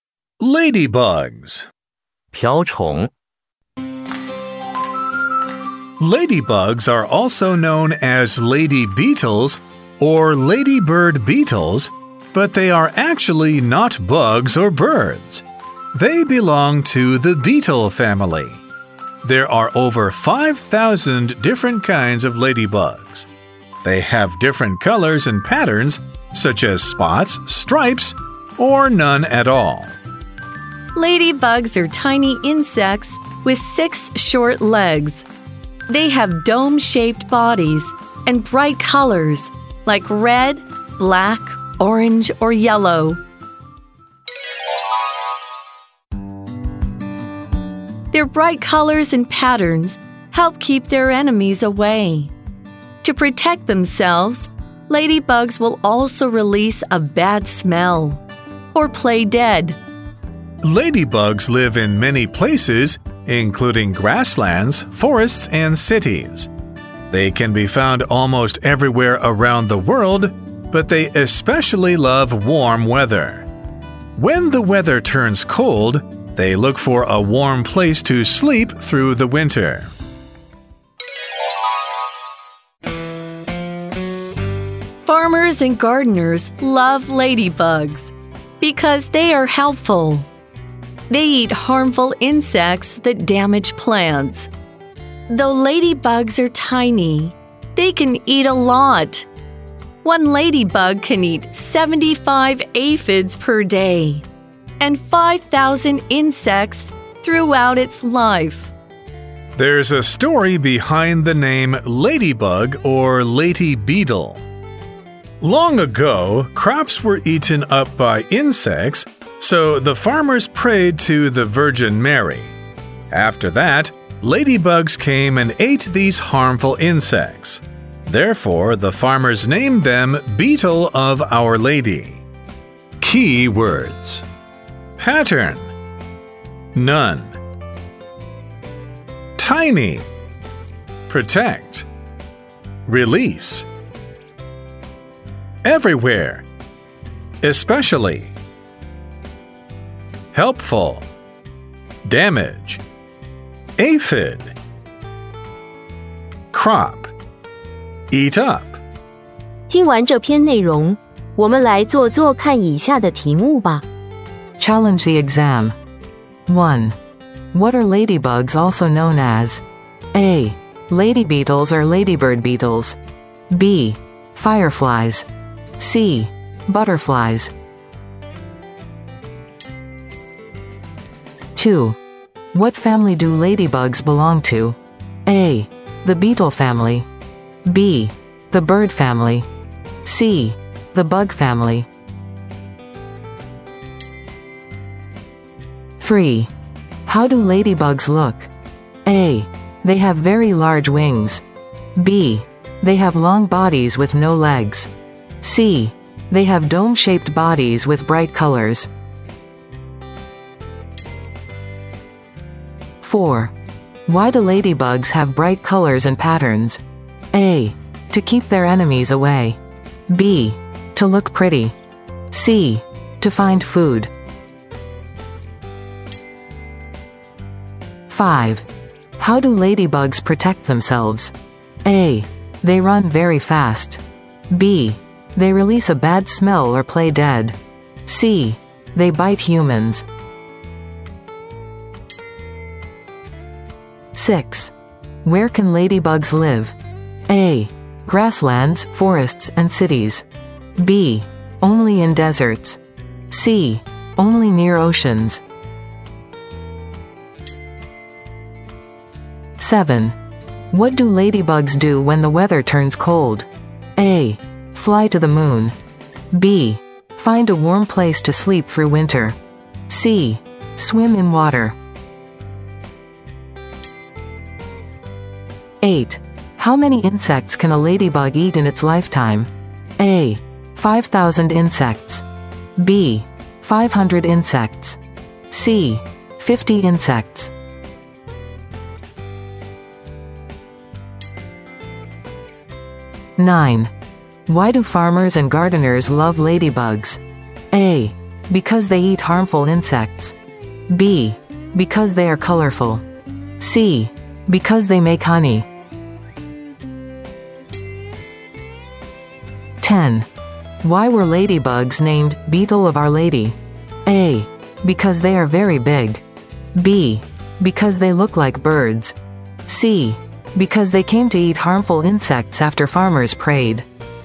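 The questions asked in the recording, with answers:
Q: What are ladybugs also known as?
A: A: Lady beetles or ladybird beetles.

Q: What family do ladybugs belong to?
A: A: The beetle family.

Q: How do ladybugs look?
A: C: They have dome-shaped bodies with bright colors.

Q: Why do ladybugs have bright colors and patterns?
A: A: To keep their enemies away.

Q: How do ladybugs protect themselves?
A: B: They release a bad smell or play dead.

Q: Where can ladybugs live?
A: A: Grasslands, forests, and cities.

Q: What do ladybugs do when the weather turns cold?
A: B: Find a warm place to sleep through winter.

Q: How many insects can a ladybug eat in its lifetime?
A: A: 5,000 insects.

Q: Why do farmers and gardeners love ladybugs?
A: A: Because they eat harmful insects.

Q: Why were ladybugs named Beetle of Our Lady?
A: C: Because they came to eat harmful insects after farmers prayed.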